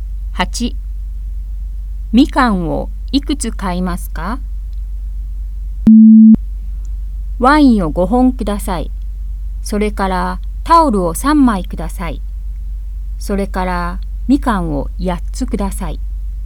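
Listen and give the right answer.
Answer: 8つ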